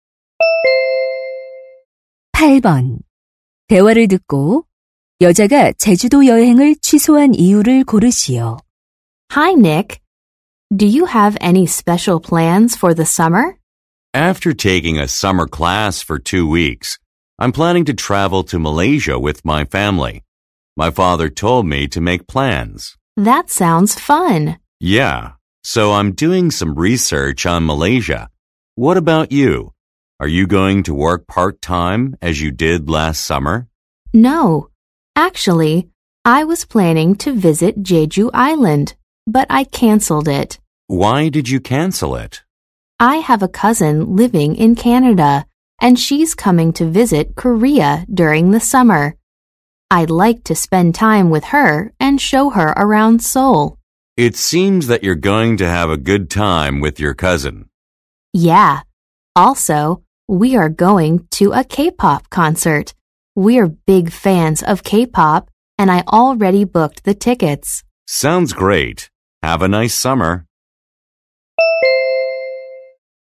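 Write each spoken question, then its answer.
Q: 대화를 듣고 여자가 제주도 여행을 취소한 이유를 고르시오.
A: 캐나다에 사는 사촌이 한국을 방문해서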